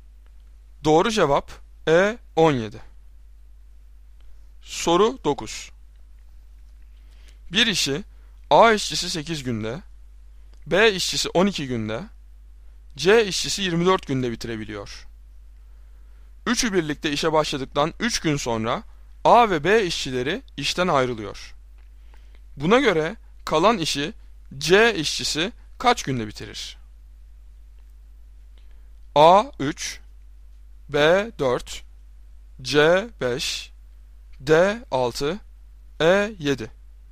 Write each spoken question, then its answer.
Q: Buna göre kalan işi C işçisi kaç günde bitirir?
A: Doğru cevap D 6.